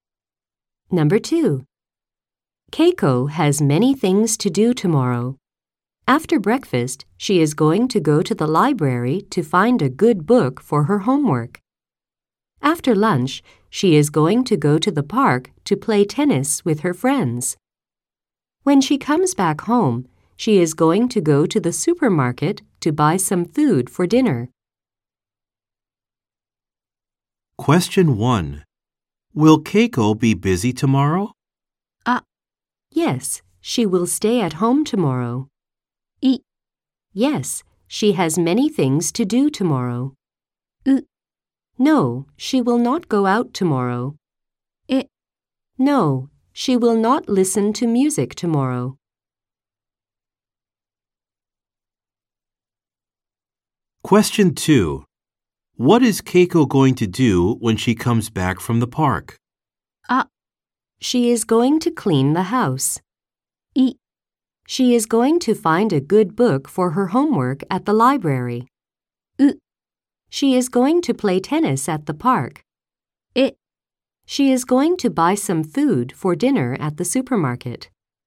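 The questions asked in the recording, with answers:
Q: Will Keiko be busy tomorrow?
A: い: Yes, she has many things to do tomorrow.

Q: What is Keiko going to do when she comes back from the park?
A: え: She is going to buy some food for dinner at the supermarket.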